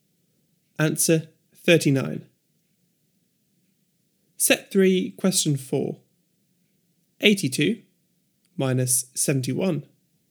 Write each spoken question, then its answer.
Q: 82 minus 71.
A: 11.